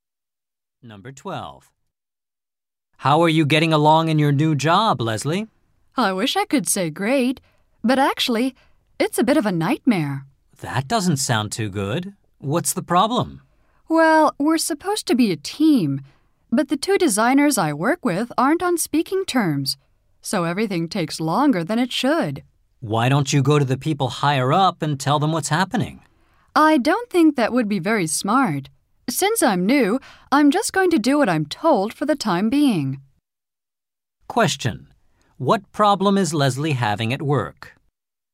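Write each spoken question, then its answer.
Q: What problem is Leslie having at work?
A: The two designers on her team aren't speaking to each other, so work takes longer.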